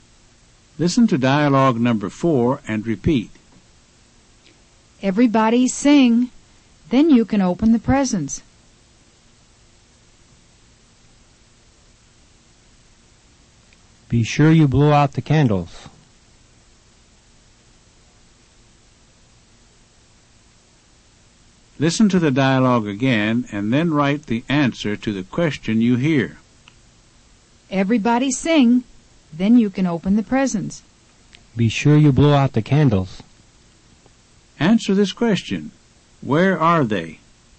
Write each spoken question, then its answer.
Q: Where are they?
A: They're at a birthday party.